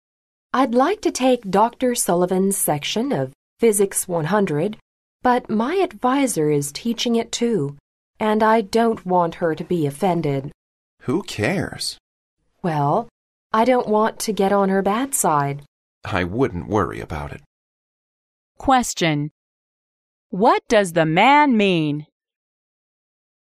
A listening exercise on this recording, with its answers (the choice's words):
What does the man mean?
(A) The woman need not consider her advisor in her decision.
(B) The woman should not take Dr. Sullivan's course.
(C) The woman need not worry about her physics course.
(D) The woman will not do a bad job in her physics course.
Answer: The woman need not consider her advisor in her decision.

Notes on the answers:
女士想选Dr. Sullivan的课,而她的导师也开此课,她便向男士征求意见,男士说Who cares?可知男士告诉女士在她的决定里不用考虑导师。

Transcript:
W: I'd like to take Dr. Sullivan's section of Physics 100, but my advisor is teaching it too, and I don't want her to be offended.
M: Who cares?
W: Well, I don't want to get on her bad side.
M: I wouldn't worry about it.
Question: What does the man mean?